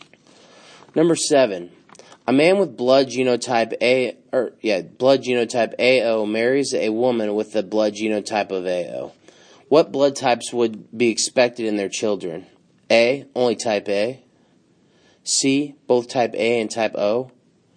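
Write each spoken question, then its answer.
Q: What blood types would be expected in their children?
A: C: both type A and type O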